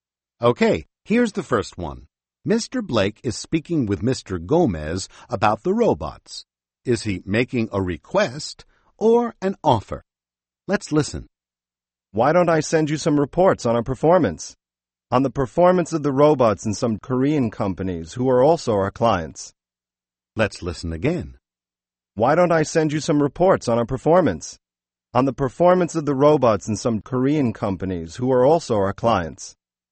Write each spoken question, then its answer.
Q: Is he making a request or an offer?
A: He's making an offer.